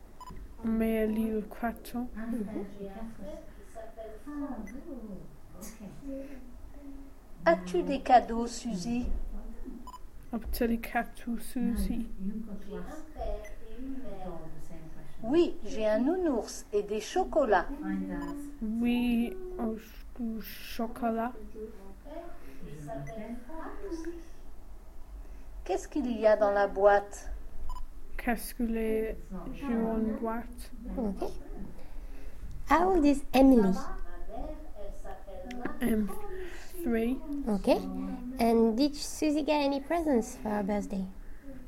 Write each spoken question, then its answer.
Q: And did Susie get any presents for her birthday?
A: Yeah.